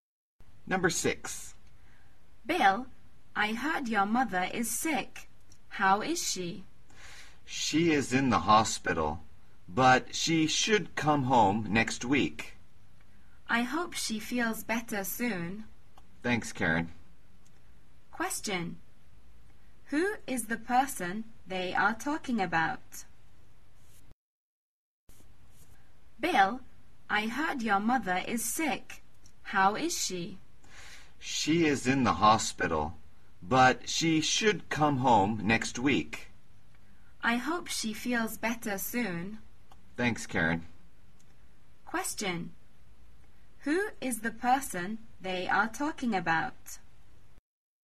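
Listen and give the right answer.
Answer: Bill's mother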